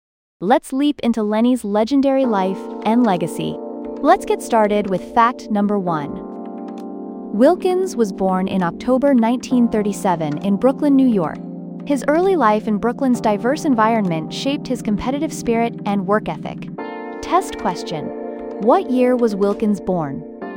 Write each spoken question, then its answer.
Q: what year was Wilkins born?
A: 1937.